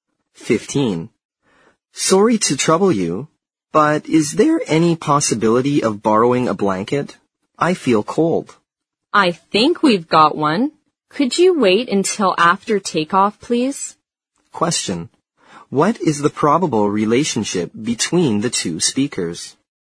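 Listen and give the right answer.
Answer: Passenger and flight attendant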